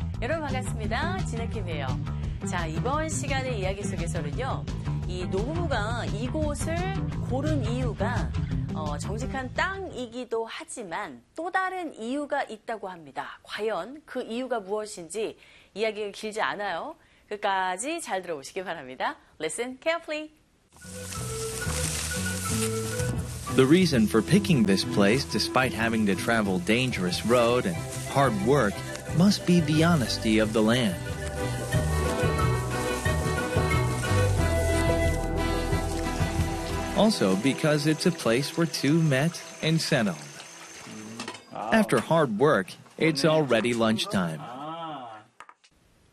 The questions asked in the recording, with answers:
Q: 이 노부부가 이곳을 고른 이유가 정직한 땅이기도 하지만 또 다른 이유가 있다고 합니다. 과연 그 이유가 무엇인지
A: 바로 두 사람이 만나고 정착한 곳이기 때문에 라는 이유가 들리셨겠죠?